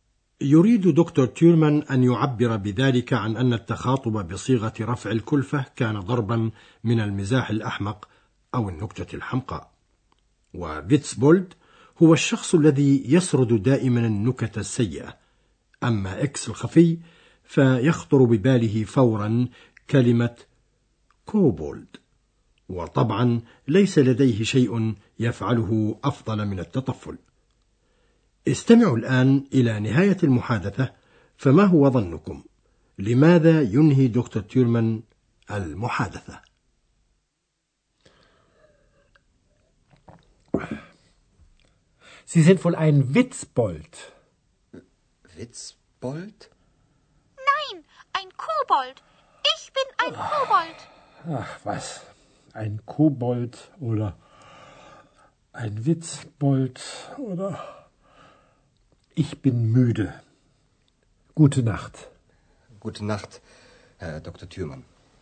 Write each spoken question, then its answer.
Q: لماذا ينهي دكتور تيرمان المحادثة؟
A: وينهي دكتور تيورمان المحادثة الآن لأنه تعب ميدة